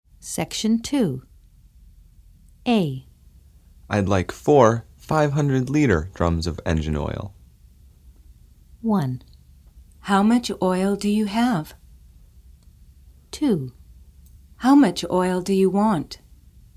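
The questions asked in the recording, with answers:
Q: I'd like 4 500-liter drums of engine oil.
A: 2: How much oil do you want?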